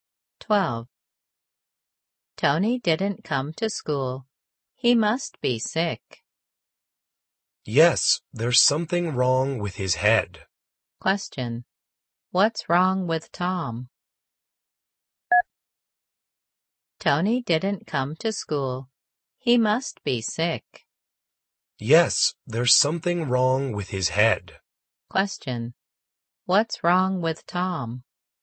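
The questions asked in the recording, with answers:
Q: What's wrong with Tom?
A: Something is wrong with his head.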